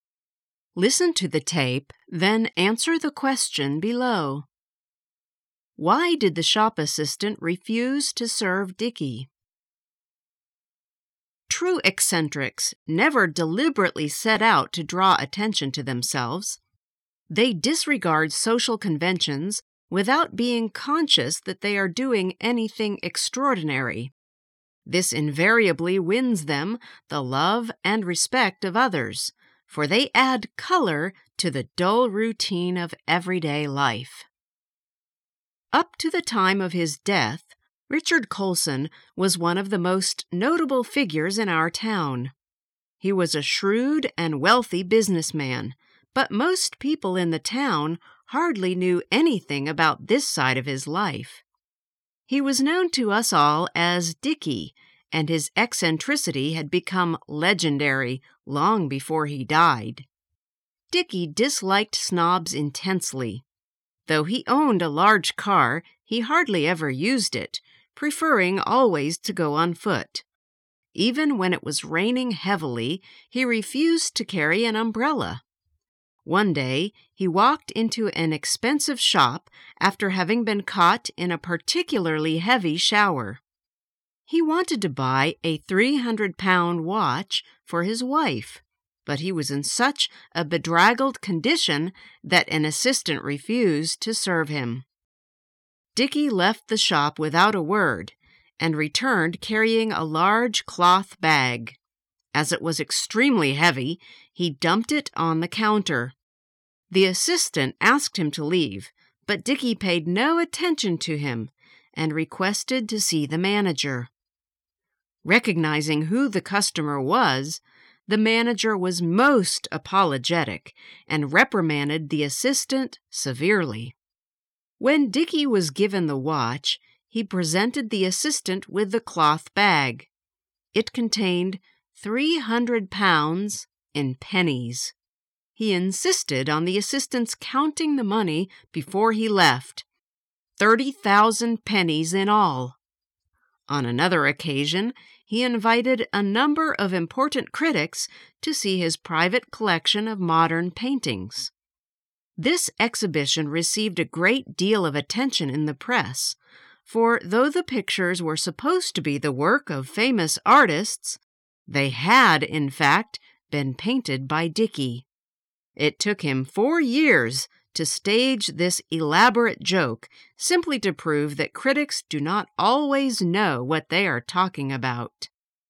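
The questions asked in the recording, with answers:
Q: Why did the shop assistant refuse to serve Dickie?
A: Because he was in a bedraggled condition after being caught in a heavy shower.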